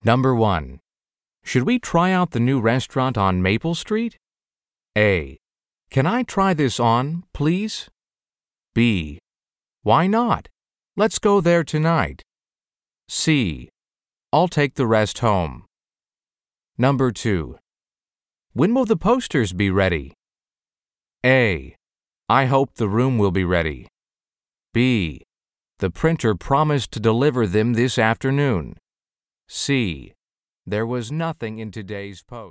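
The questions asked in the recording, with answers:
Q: Should we try out the new restaurant on Maple Street?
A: B: Why not? Let's go there tonight.

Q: When will the posters be ready?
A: B: The printer promised to deliver them this afternoon.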